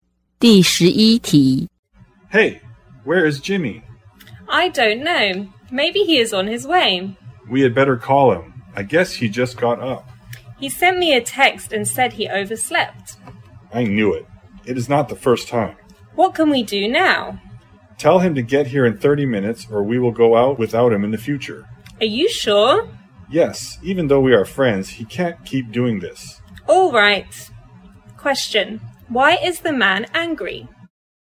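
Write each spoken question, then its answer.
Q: Why is the man angry?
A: Jimmy overslept and is late again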